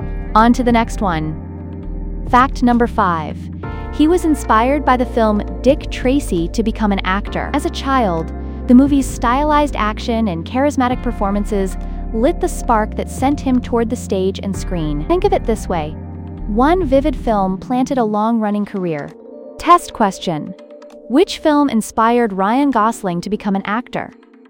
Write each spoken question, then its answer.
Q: Which film inspired Ryan Gosling to become an actor?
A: Correct answer. Dick Tracy.